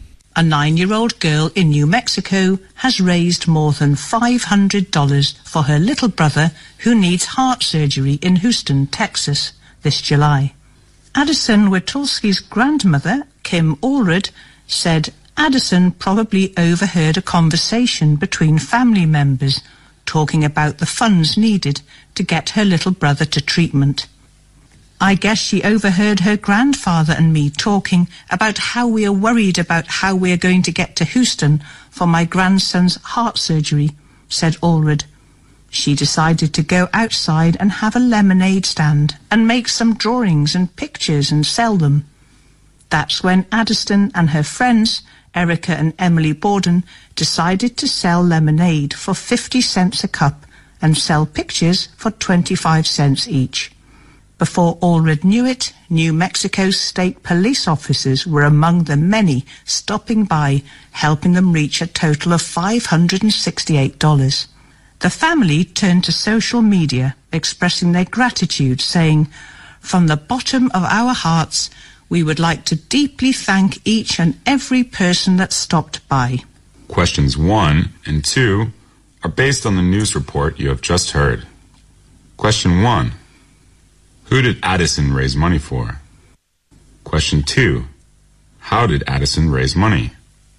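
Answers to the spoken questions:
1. Her little brother, who needs heart surgery
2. By selling lemonade and drawings/pictures at a lemonade stand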